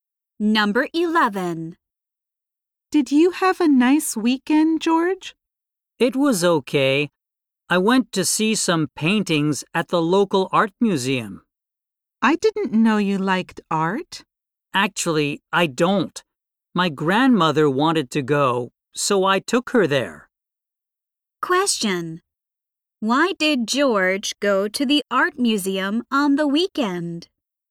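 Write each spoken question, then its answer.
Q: Why did George go to the art museum on the weekend?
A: His grandmother wanted to go, so he took her.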